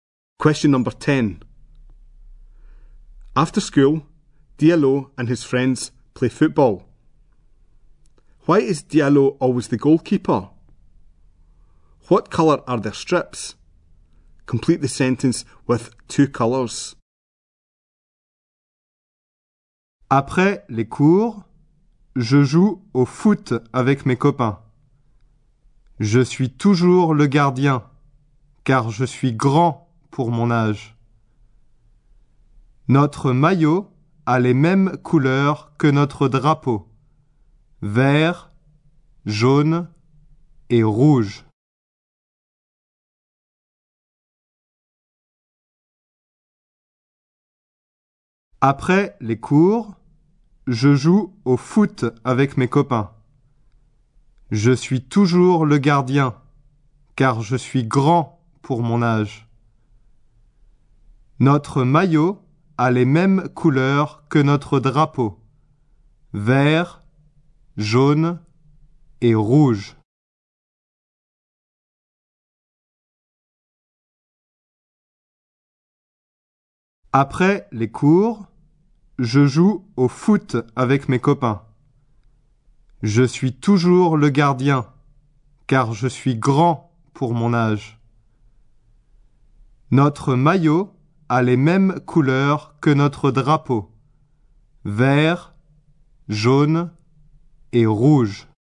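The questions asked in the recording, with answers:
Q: Why is Diallo always the goalkeeper?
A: Because he is tall for his age

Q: What colour are their strips?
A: Green, yellow and red (like their flag)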